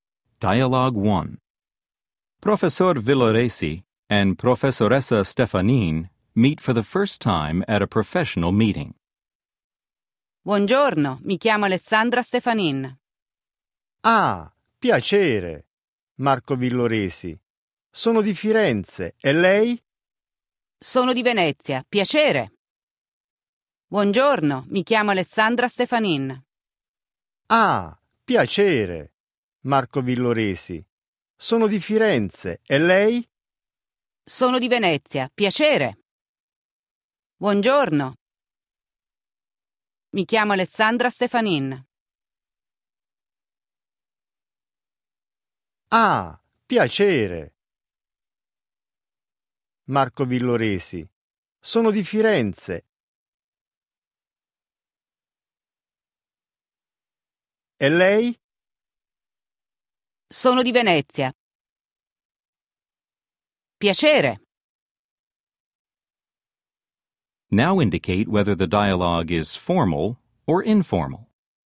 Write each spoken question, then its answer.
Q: Now indicate whether the dialogue is formal or informal.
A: 1. Formale.